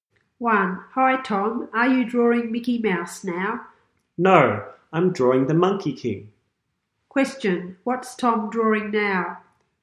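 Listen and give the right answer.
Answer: The Monkey King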